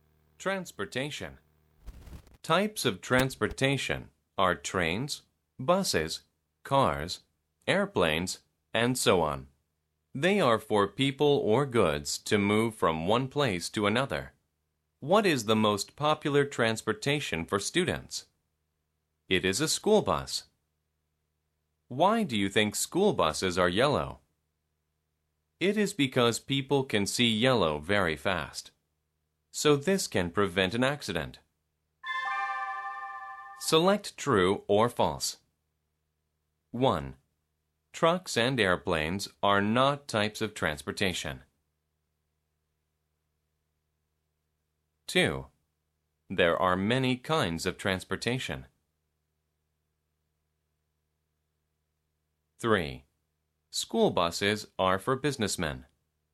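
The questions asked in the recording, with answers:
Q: Trucks and airplanes are not types of transportation.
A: False

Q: There are many kinds of transportation.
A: True

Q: School buses are for businessmen.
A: False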